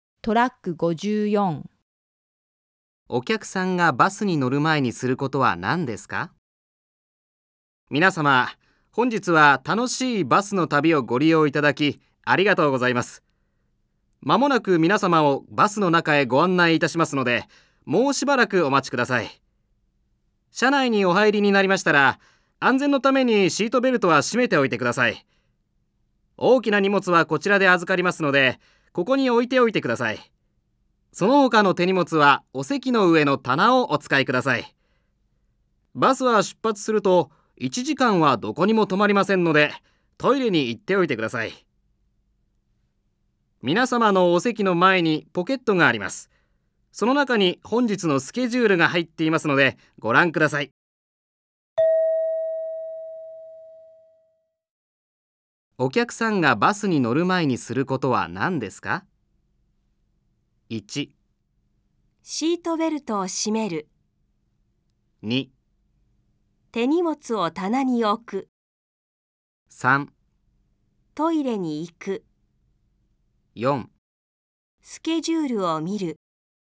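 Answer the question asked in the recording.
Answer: 3: トイレに行く。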